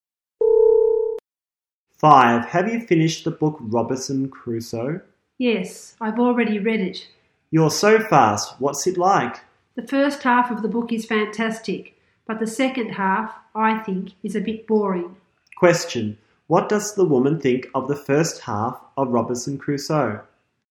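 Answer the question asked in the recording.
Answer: Fantastic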